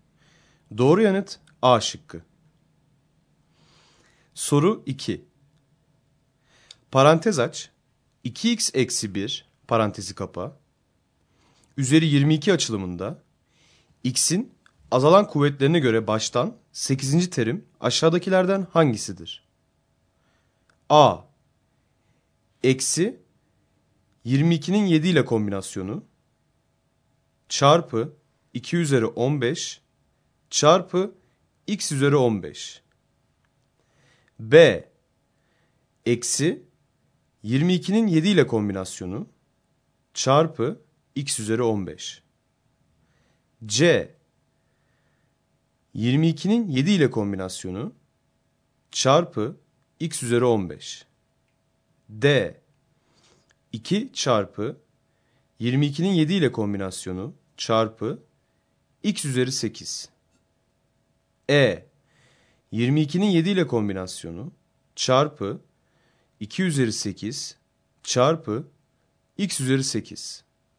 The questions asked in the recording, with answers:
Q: Parantez aç, 2x-1 parantezi kapa, üzeri 22 açılımında, x'in azalan kuvvetlerine göre baştan 8. terim aşağıdakilerden hangisidir?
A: Doğru yanıt A şıkkı.